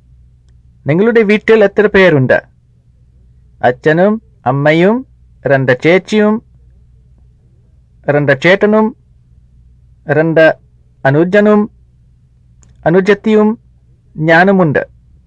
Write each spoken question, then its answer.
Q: നിങ്ങളുടെ വീട്ടിൽ എത്ര പേരുണ്ട്?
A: പത്ത് പേരുണ്ട്.